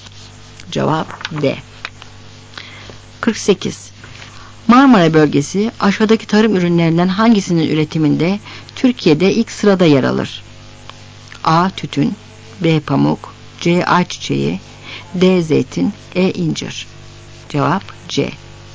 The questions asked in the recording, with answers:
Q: Marmara bölgesi aşağıdaki tarım ürünlerinden hangisinin üretiminde Türkiye'de ilk sırada yer alır?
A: Cevap C.